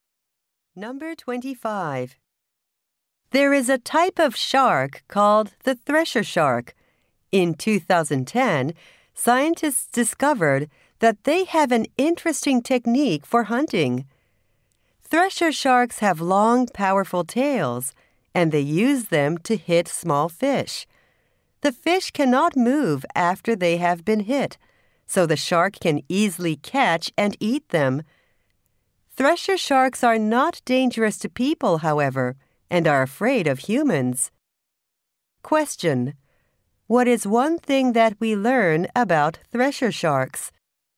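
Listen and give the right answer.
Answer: They hit small fish with their tails to catch them.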